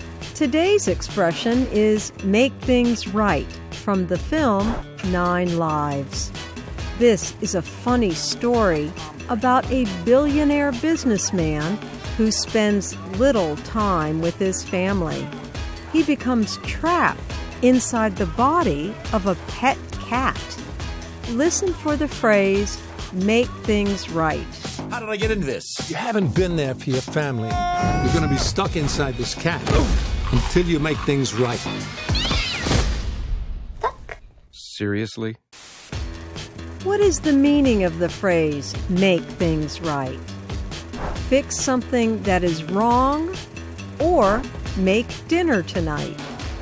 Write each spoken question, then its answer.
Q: What is the meaning of the phrase, make things right?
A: Make things right means to fix something that is wrong.